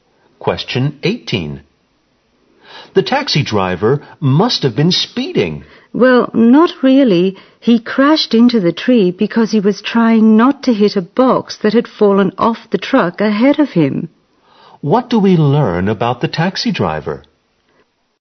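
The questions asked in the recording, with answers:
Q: What do we learn about the taxi driver?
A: He crashed into a tree while trying to avoid a box that had fallen off the truck ahead of him, not because he was speeding.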